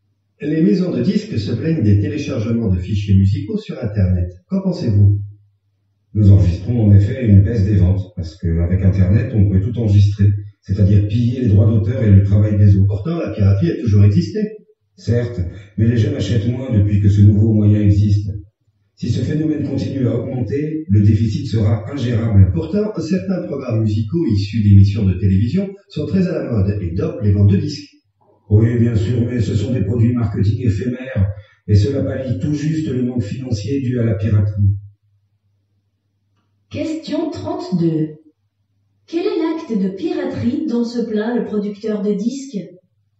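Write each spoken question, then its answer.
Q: Quel est l'acte de piraterie dont se plaint le producteur de disques ?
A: Le téléchargement de fichiers musicaux sur Internet (qui pille les droits d'auteur)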